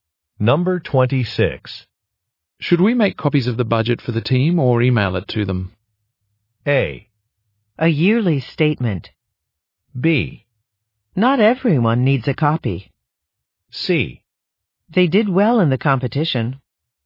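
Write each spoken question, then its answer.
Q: Should we make copies of the budget for the team or email it to them?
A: B: Not everyone needs a copy.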